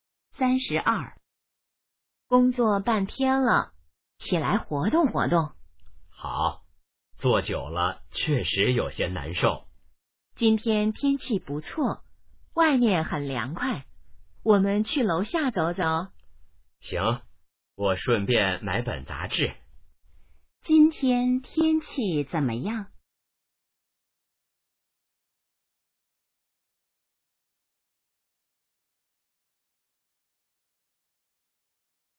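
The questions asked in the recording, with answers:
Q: 今天天气怎么样?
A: 不错,很凉快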